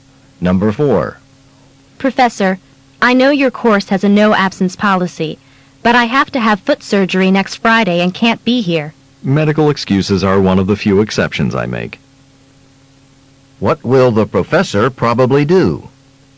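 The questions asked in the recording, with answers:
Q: What will the professor probably do?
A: Excuse the student's absence for surgery.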